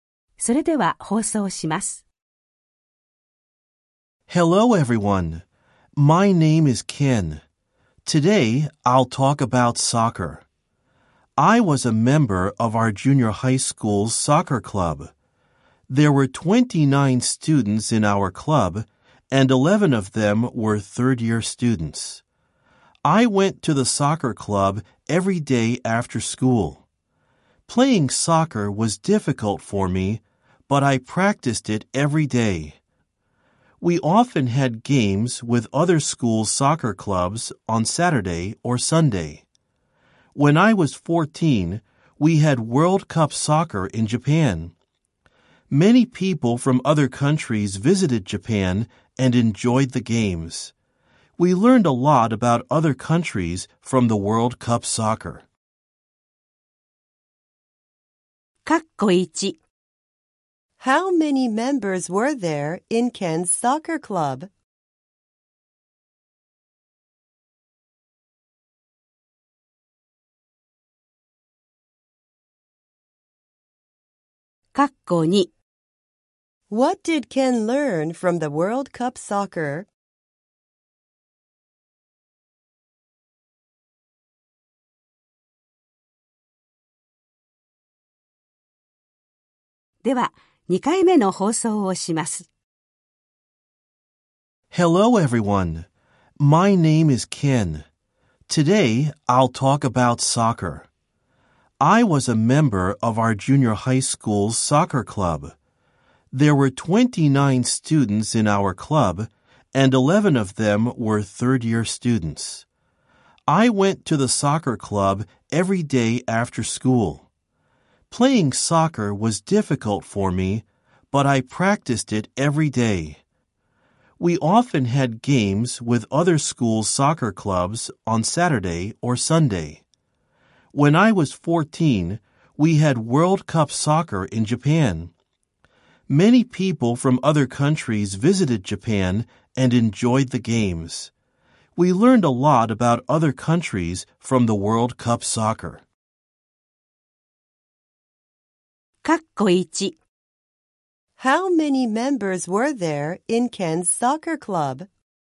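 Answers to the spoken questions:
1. 29 students
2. A lot about other countries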